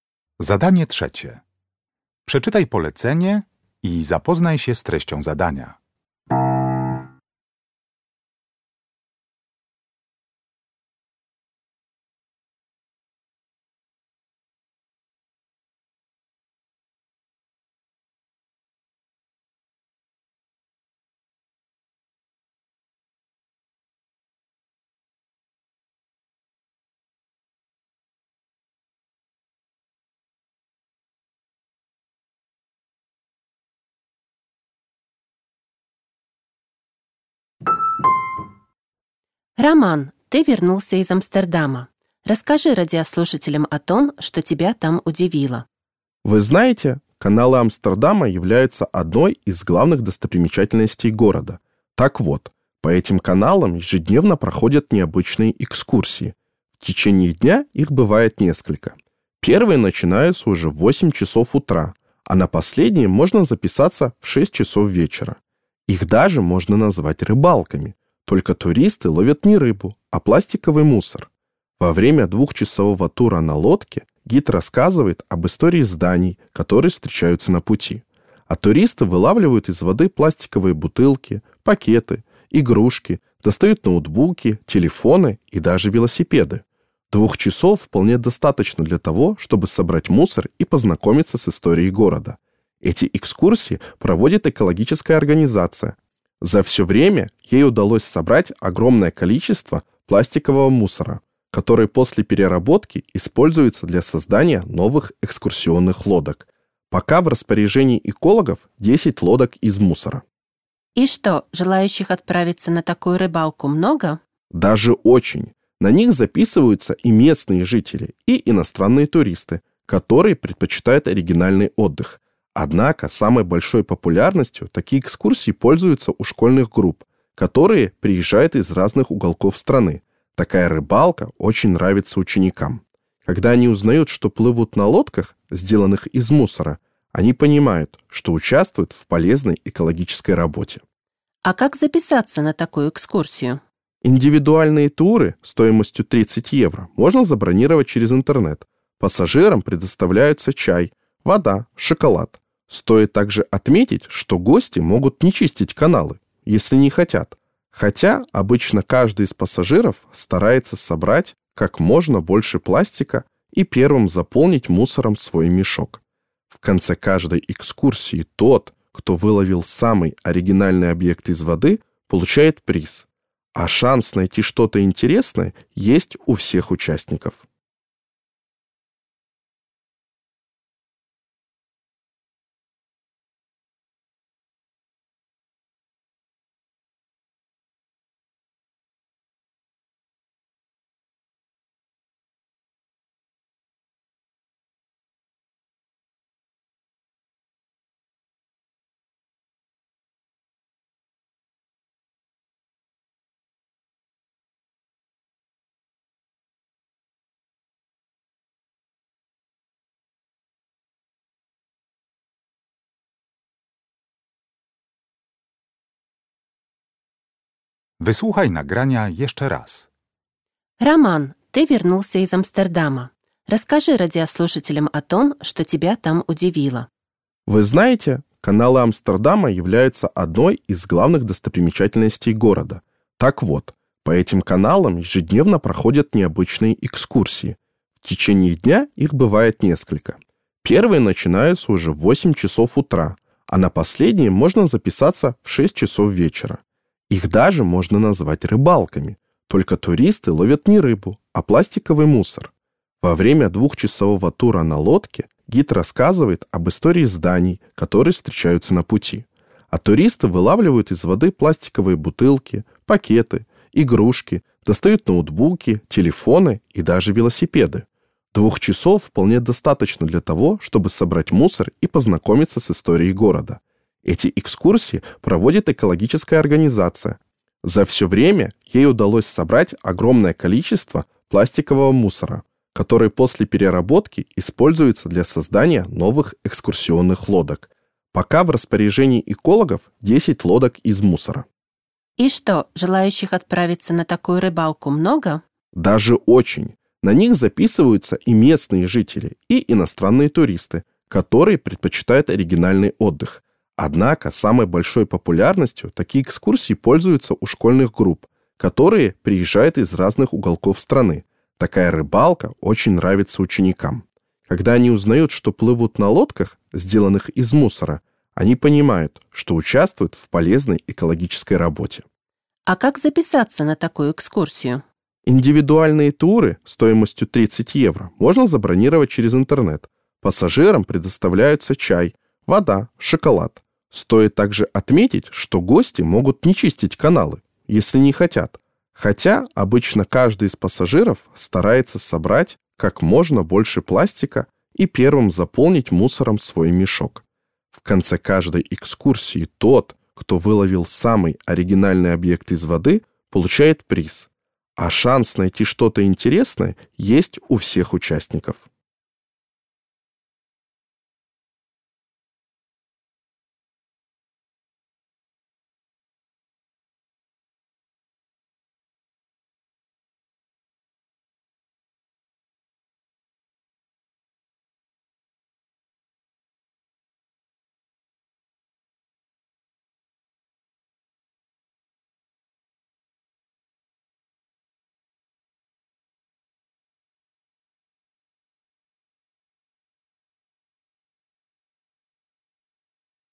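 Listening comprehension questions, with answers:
Uruchamiając odtwarzacz z oryginalnym nagraniem CKE usłyszysz dwukrotnie rozmowę na temat oryginalnej wycieczki po kanałach Amsterdamu. Na podstawie informacji zawartych w nagraniu odpowiedz krótko na pytania 3.1.–3.4., tak aby jak najbardziej precyzyjnie oddać sens wysłuchanego tekstu. Na pytania należy odpowiedzieć w języku rosyjskim.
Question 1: Как долго продолжается экскурсия по каналам Амстердама?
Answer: Два часа.

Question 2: Что делают из пластика, выловленного из каналов?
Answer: Новые экскурсионные лодки.

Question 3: Кто чаще всего принимает участие в «экскурсиях-рыбалках»?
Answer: Школьные группы.

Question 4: Кому вручают награду в конце рейса?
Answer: Тому, кто выловил самый оригинальный объект из воды.

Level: Poziom: podstawowy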